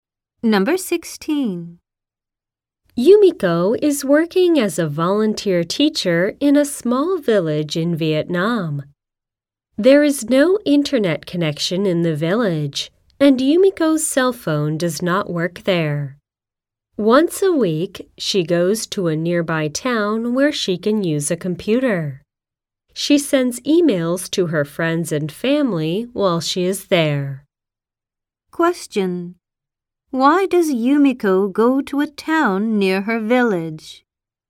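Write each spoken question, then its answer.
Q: Why does Yumiko go to a town near her village?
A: To use a computer to send emails to friends and family.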